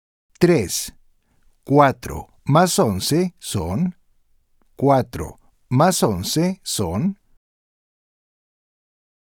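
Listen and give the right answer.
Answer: 15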